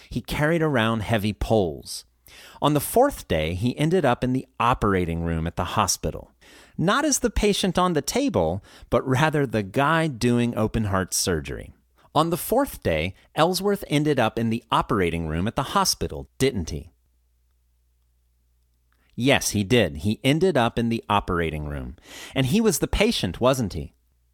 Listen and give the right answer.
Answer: No, he wasn't the patient.